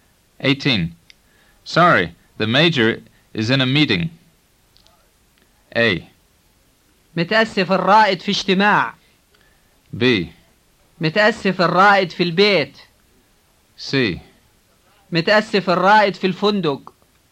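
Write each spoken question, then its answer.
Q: Sorry, the major is in a meeting.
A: A: متأسف الرائد في اجتماع.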